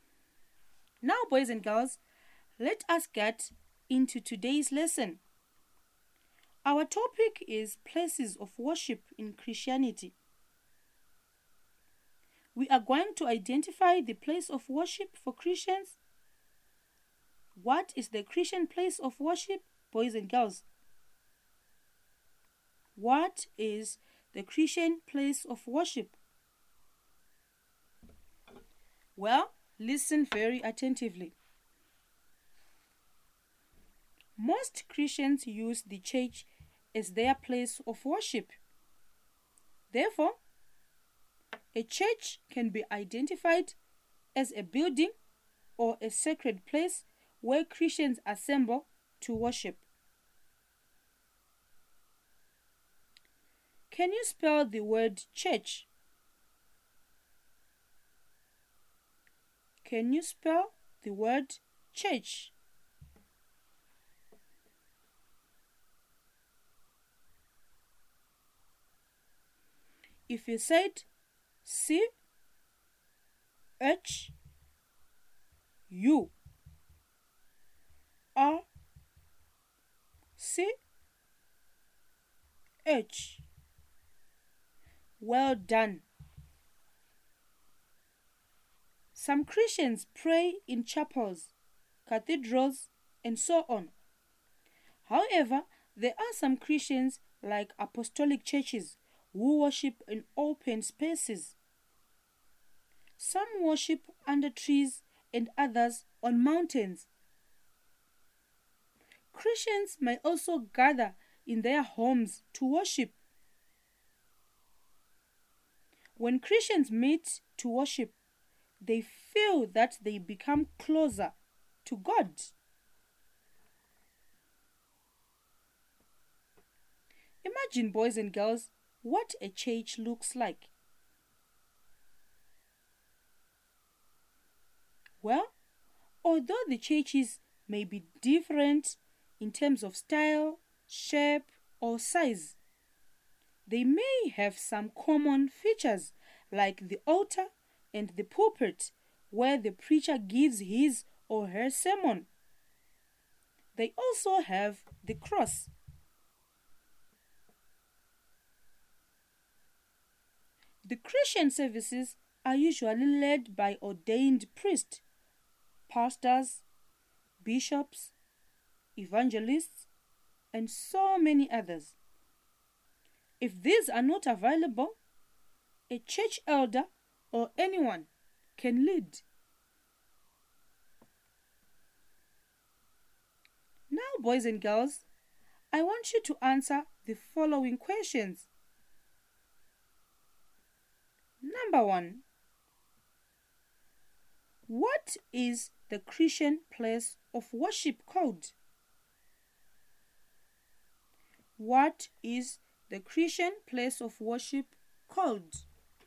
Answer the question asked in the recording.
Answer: Well, the Christian place of worship is called a church.